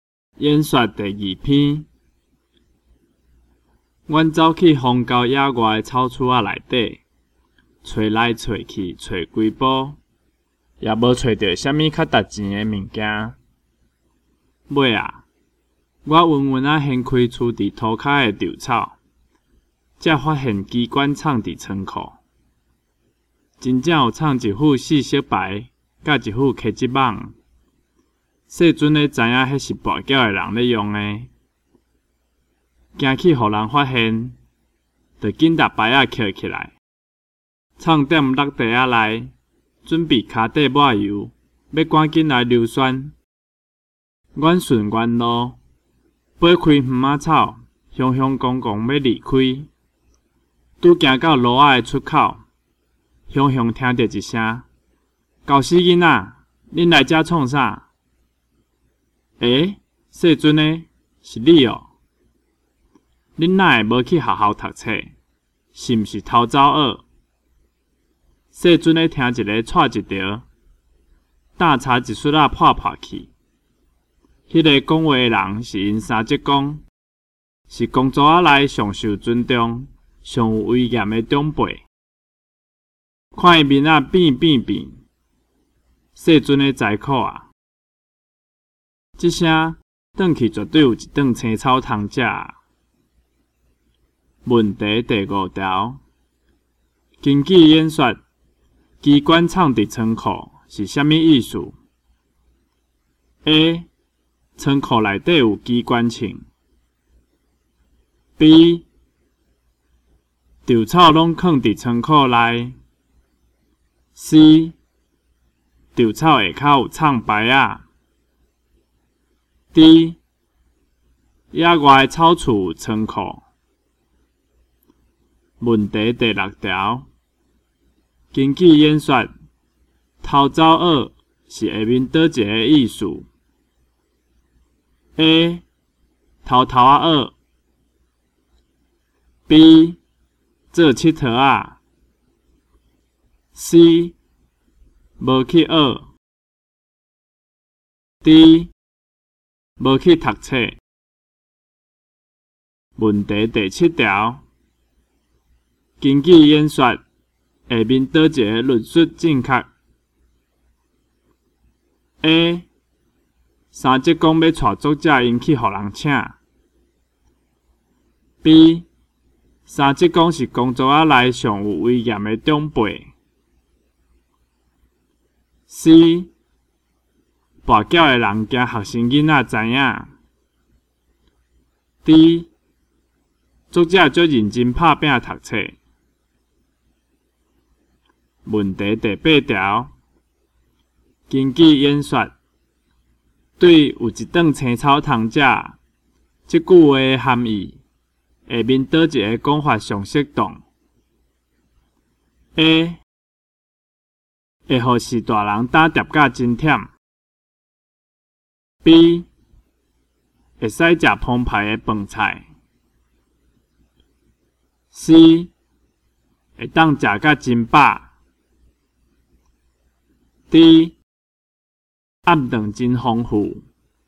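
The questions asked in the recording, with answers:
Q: 根据演说,机关藏在仓库是什么意思?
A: C: 稻草下骹有藏牌仔。

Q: 根据演说,下面倒一个论述正确?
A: B: 三叔公是公祖仔内上有威严的长辈。

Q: 根据演说,对有一顿青草汤吃,即句话的含义,下面倒一个讲法上适当 ?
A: A: 会乎是大人打叠甲真忝。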